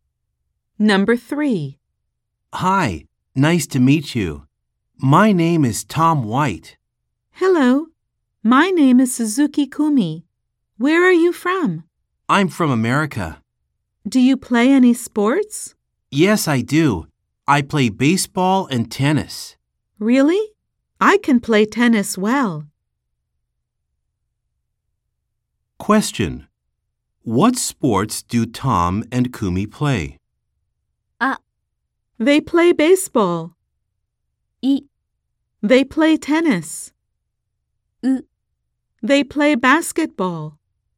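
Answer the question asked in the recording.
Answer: B: They play tennis.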